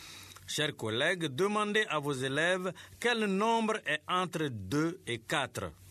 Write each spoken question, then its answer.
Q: Chers collègues, demandez à vos élèves quel nombre est entre 2 et 4.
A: Monsieur, c'est 3.